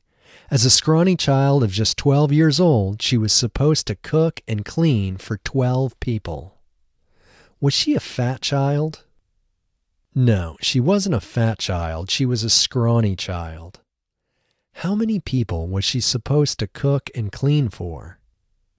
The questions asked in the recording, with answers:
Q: How many people was she supposed to cook and clean for?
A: She was supposed to cook and clean for 12 people.